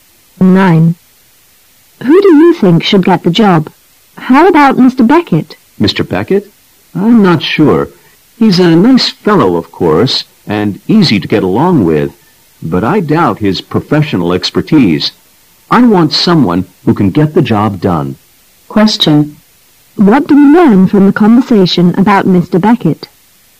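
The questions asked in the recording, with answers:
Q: What do we learn from the conversation about Mr. Beckett?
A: He is easy to get along with, but his professional skills are doubtful.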